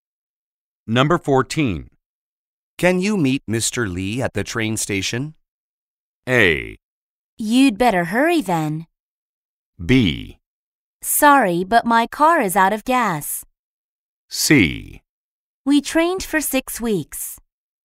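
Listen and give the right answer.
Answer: B: Sorry, but my car is out of gas.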